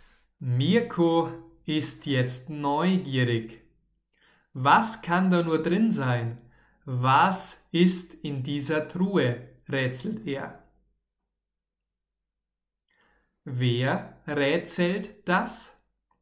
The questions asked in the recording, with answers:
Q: Wer rätselt das?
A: Mirko, Mirko rätselt das.